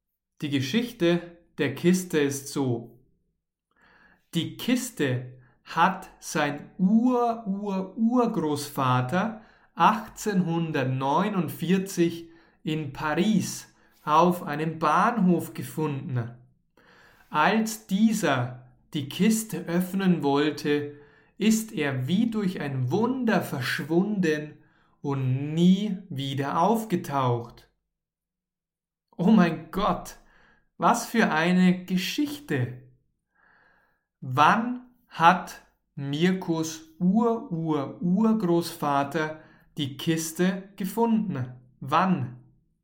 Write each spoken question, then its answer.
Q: Wann hat Mirkus Ur-Ur-Urgroßvater die Kiste gefunden?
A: 1849. Mirkos Ur-Ur-Urgroßvater hat die Kiste 1849 gefunden.